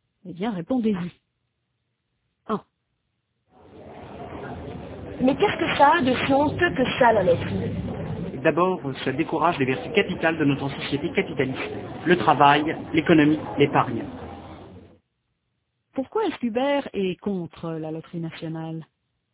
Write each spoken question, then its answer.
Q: Pourquoi est-ce qu'Hubert est contre la loterie nationale ?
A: Parce qu'il pense que ça décourage les vertus capitales de notre société capitaliste.